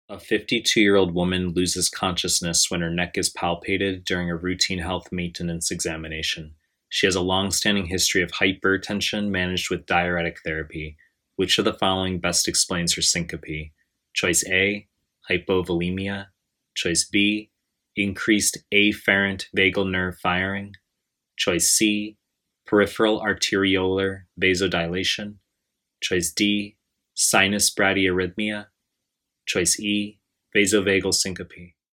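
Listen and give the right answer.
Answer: D: sinus bradyarrhythmia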